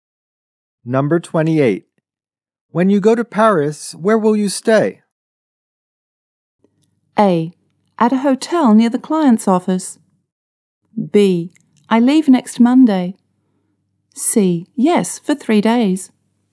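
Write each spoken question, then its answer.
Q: When you go to Paris, where will you stay?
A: A: At a hotel near the client's office.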